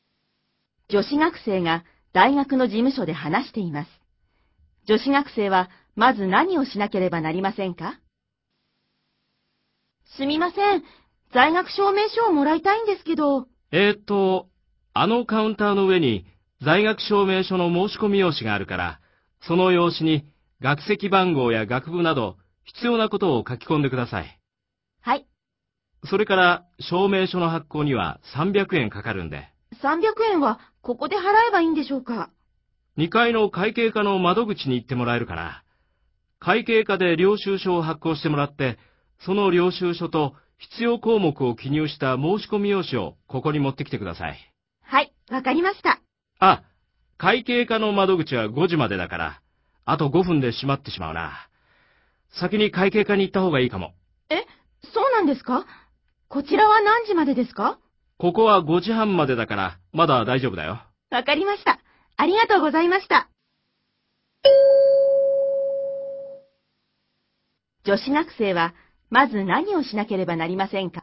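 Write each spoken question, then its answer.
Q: 女子学生はまず何をしなければなりませんか?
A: 2階の会計課に行って300円を払う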